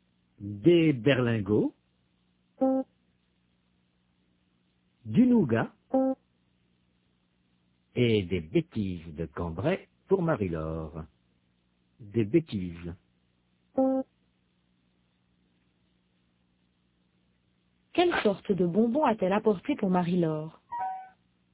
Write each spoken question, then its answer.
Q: Quelle sorte de bonbons a-t-elle apporté pour Marie-Laure ?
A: Des bêtises de Cambrai.